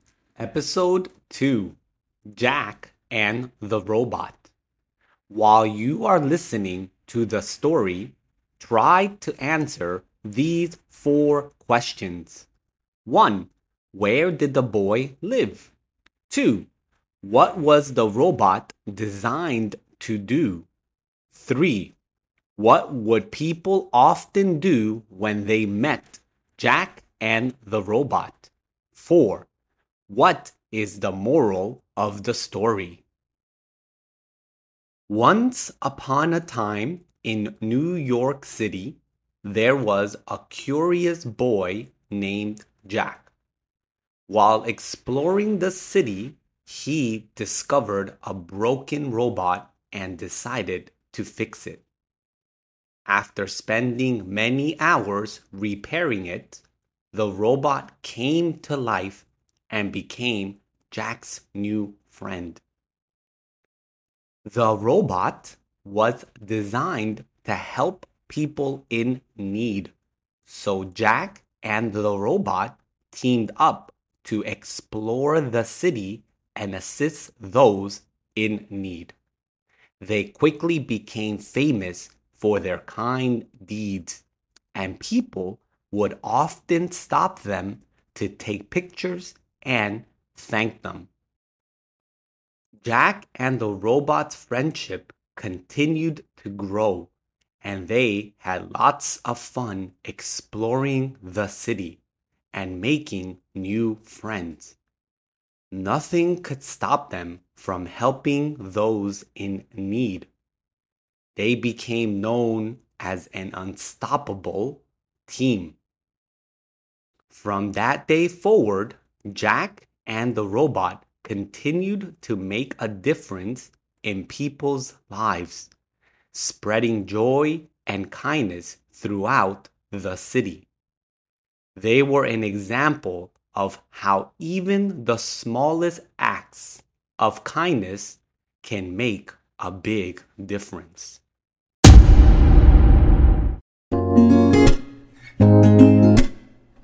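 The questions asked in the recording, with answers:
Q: Where did the boy live?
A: In New York City

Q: What was the robot designed to do?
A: To help people in need

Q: What would people often do when they met Jack and the robot?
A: Stop them to take pictures and thank them

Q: What is the moral of the story?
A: Even the smallest acts of kindness can make a big difference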